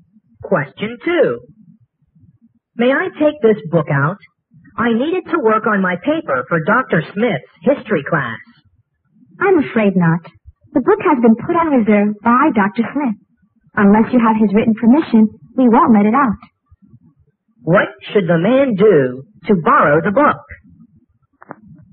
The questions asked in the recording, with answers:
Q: What should the man do to borrow the book?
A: 你必须有这个教授给你写的条